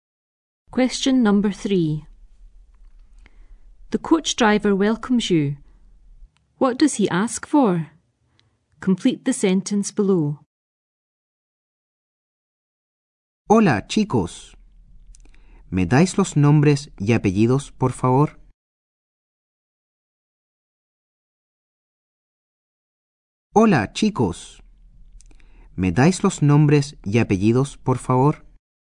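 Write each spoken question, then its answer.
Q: What does he ask for?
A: Your first names and surnames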